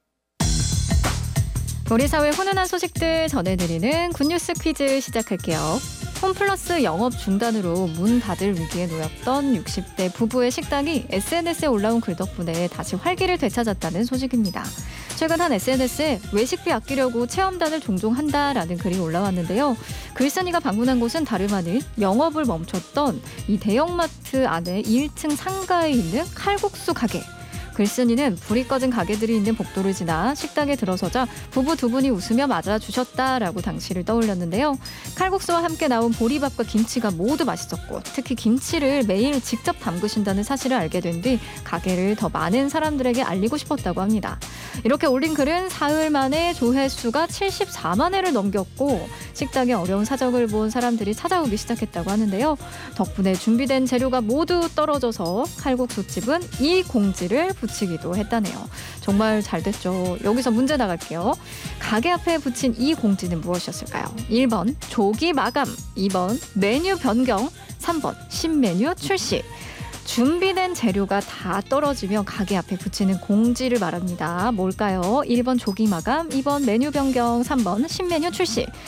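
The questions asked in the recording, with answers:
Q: 가게 앞에 붙인 이 공지는 무엇이었을까요?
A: 1: 조기 마감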